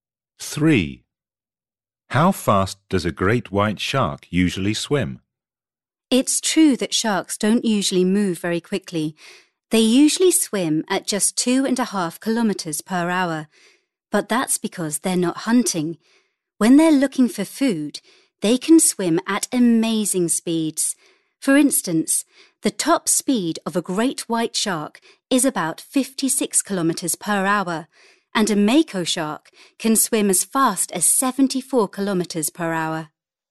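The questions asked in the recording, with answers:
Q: How fast does a great white shark usually swim?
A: 2.5 kilometres per hour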